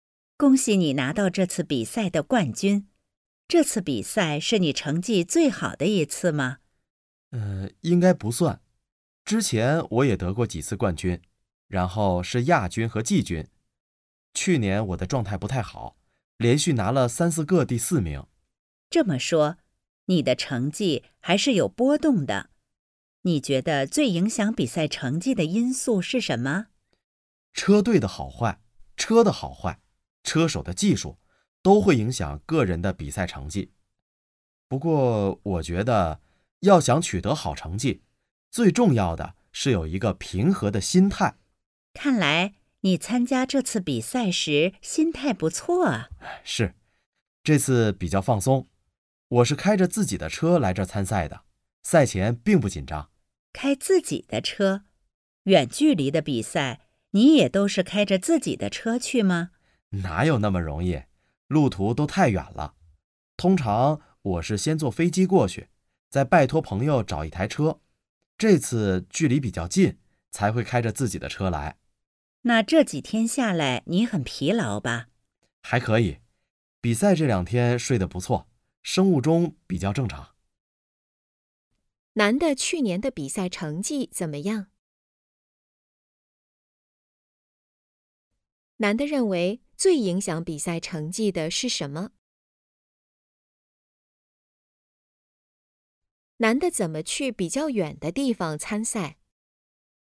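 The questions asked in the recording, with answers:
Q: 男的去年的比赛成绩怎么样?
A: 不太好,连续拿了三四个第四名

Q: 男的认为最影响比赛成绩的是什么?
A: 心态(平和的心态)

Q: 男的怎么去比较远的地方参赛?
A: 先坐飞机过去,再拜托朋友找一台车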